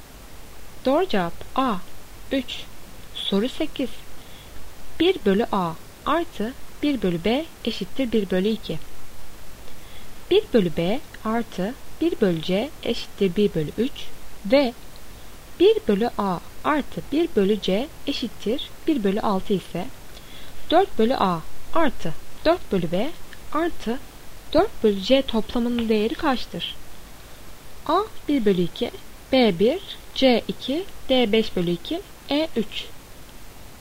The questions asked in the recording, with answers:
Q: 1 bölü B artı 1 bölü C eşittir 1 bölü 3 ve 1 bölü A artı 1 bölü C eşittir 1 bölü 6 ise 4 bölü A artı 4 bölü B artı 4 bölü C toplamının değeri kaçtır?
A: Doğru cevap C 2.